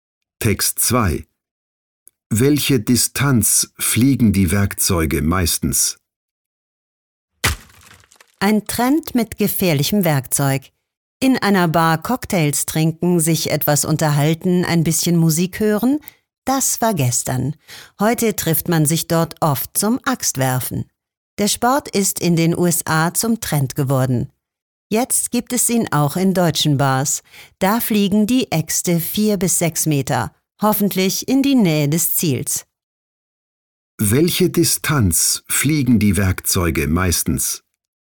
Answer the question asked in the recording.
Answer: Beim Axtwerfen fliegen die Äxte 4 bis 6 Meter, bis sie das Ziel treffen.